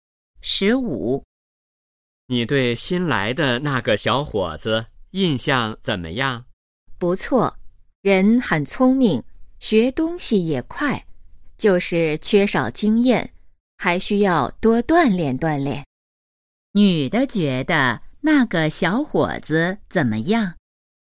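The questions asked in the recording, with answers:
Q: 女的觉得那个小伙子怎么样?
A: 很聪明,但缺少经验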